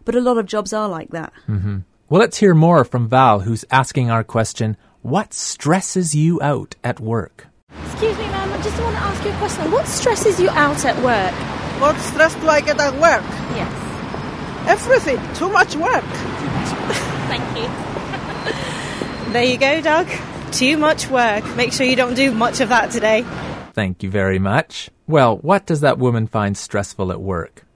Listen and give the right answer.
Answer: Everything, she said.